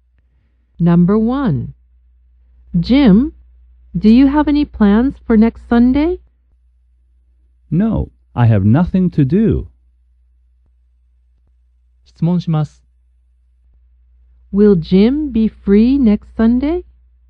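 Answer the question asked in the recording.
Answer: Yes, he will.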